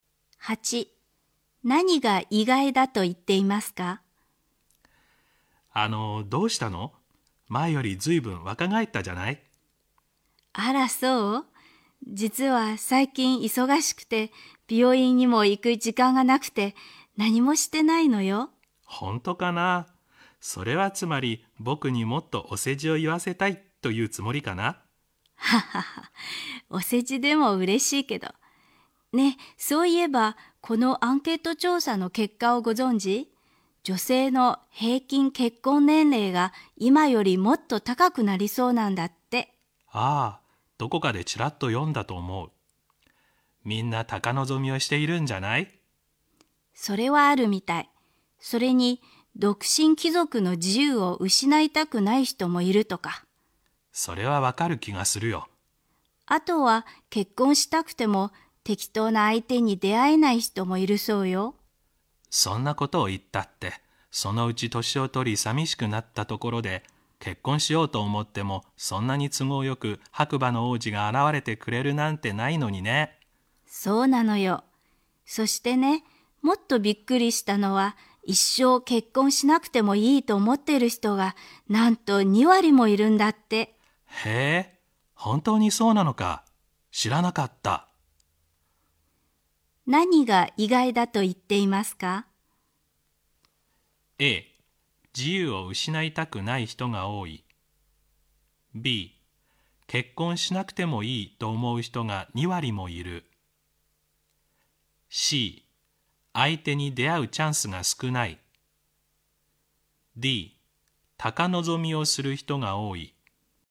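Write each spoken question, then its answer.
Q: 何が意外だと言っていますか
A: B: 結婚しなくてもいいと思う人が2割もいる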